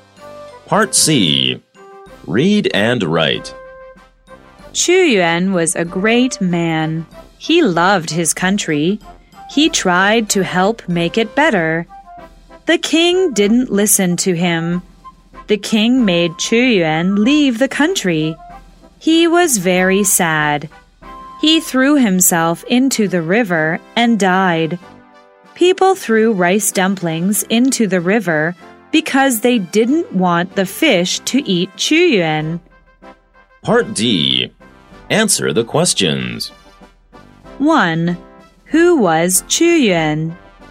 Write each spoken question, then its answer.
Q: Who was Xu Yuan?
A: He was a great man.